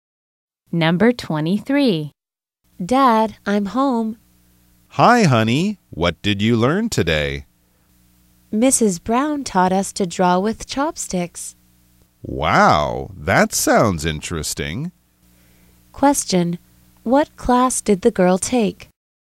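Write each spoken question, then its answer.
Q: What class did the girl take?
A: Art class.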